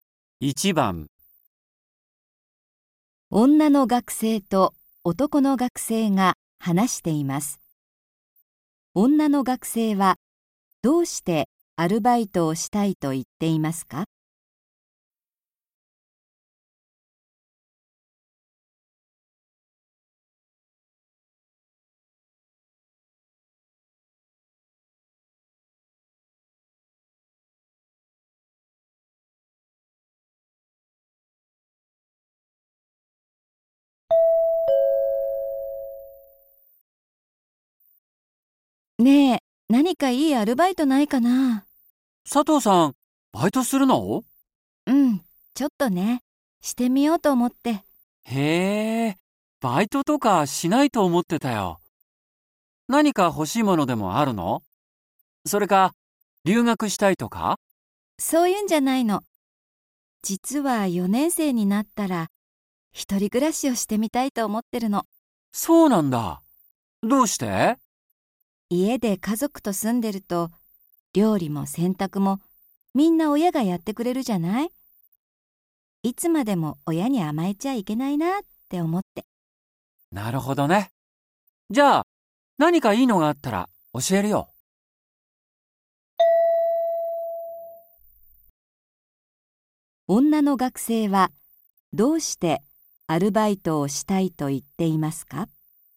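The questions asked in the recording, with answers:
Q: 女の学生はどうしてアルバイトをしたいと言っていますか?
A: 4年生になったら一人暮らしをしてみたいから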